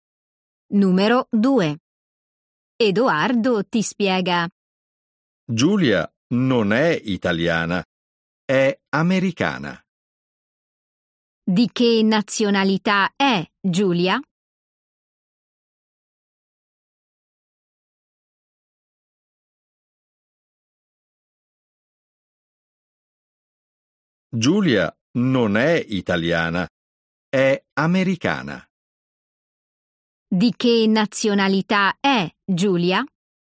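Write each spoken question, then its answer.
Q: Di che nazionalità è Giulia?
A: americana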